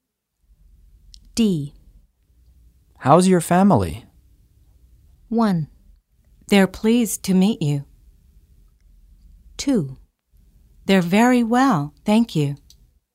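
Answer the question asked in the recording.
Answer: 2: They're very well, thank you.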